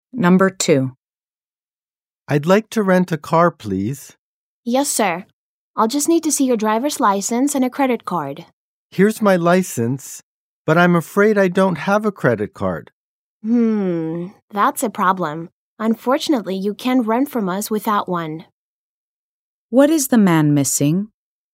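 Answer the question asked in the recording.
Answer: A credit card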